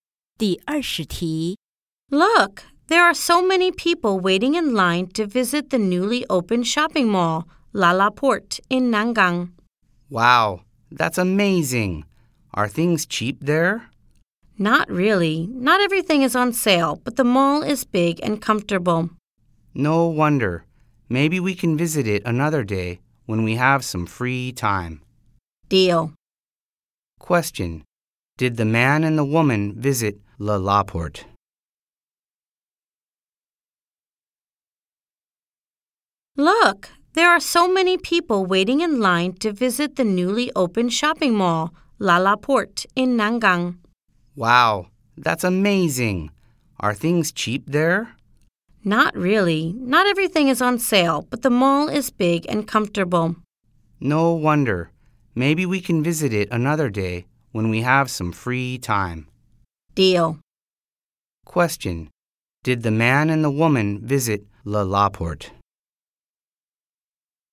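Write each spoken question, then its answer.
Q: Did the man and the woman visit LaLaport?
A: No, not yet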